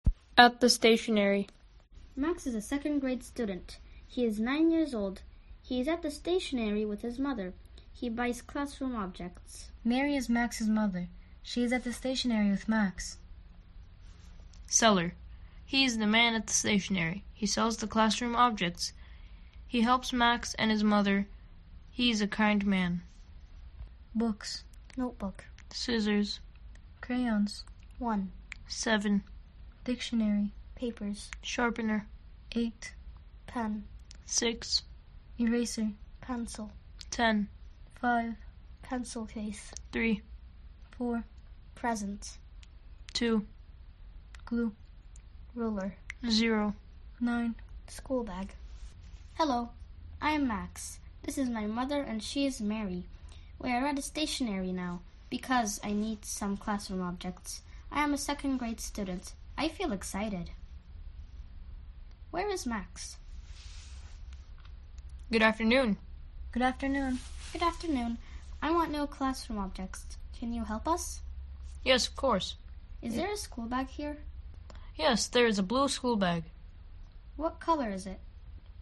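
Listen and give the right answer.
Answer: Blue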